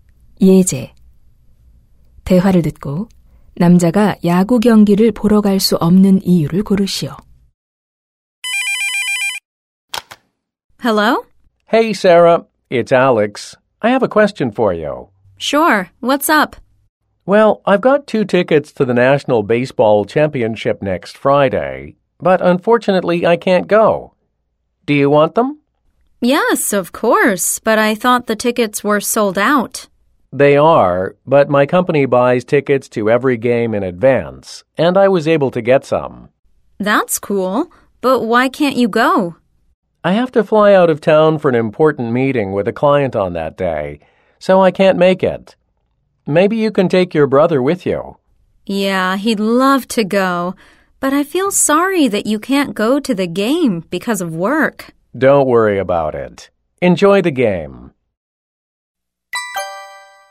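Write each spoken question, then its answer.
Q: 대화를 듣고 남자가 야구 경기를 보러 갈 수 없는 이유를 고르시오.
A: 고객과의 중요한 회의 때문에 출장을 가야 해서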